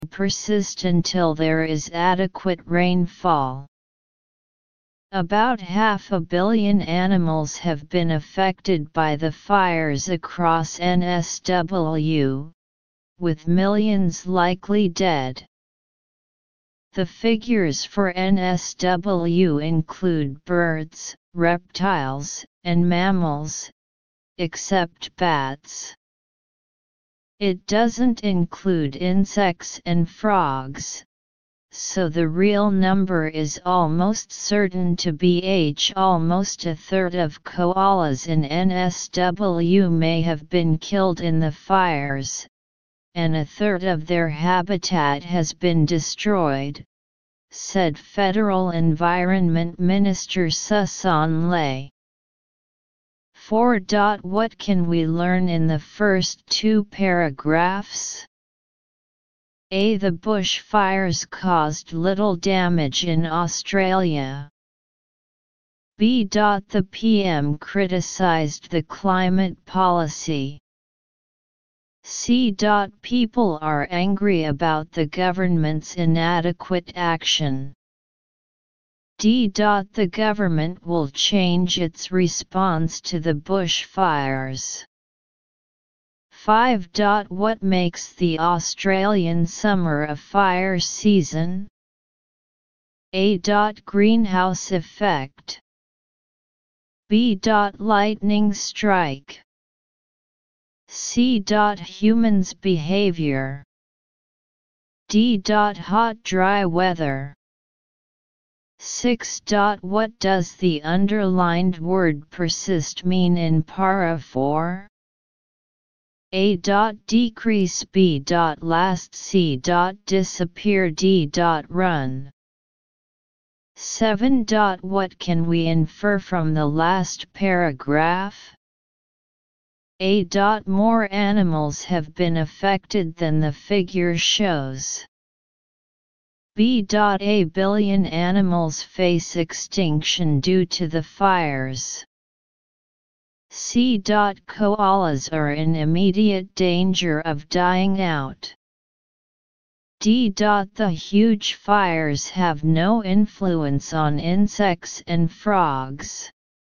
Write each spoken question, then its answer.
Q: What does the underlined word persist mean in para 4?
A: 6. B.

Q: What can we infer from the last paragraph?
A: 7. A.